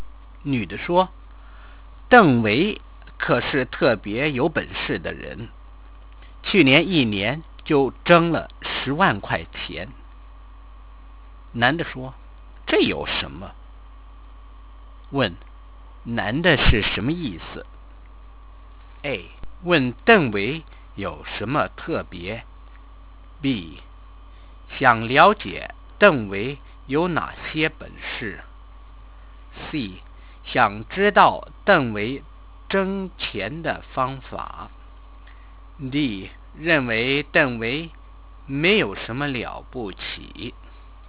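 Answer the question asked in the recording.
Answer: D: 认为邓维没有什么了不起。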